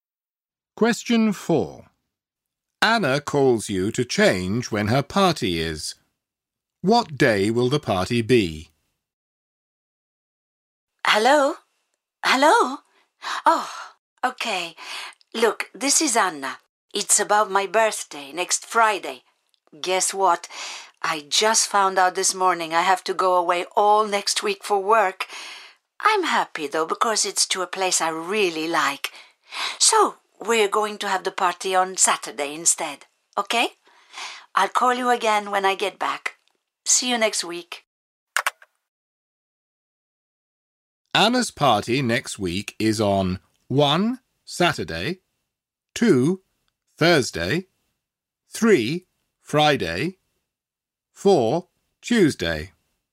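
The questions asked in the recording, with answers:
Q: What day will the party be?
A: 1: Saturday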